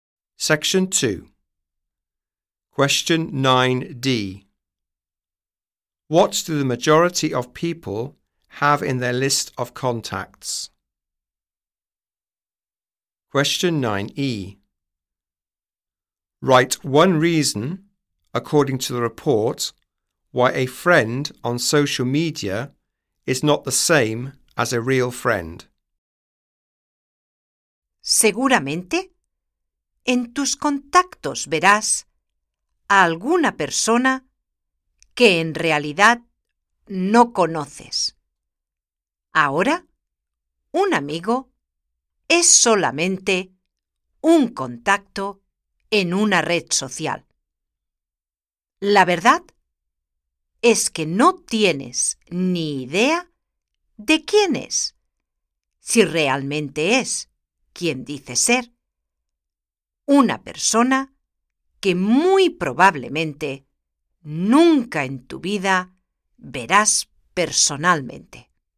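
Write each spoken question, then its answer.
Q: What do the majority of people have in their list of contacts?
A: Someone they don't really know

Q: Write one reason, according to the report, why a friend on social media is not the same as a real friend.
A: You don't know who they are or if they are who they say; you will probably never meet them in person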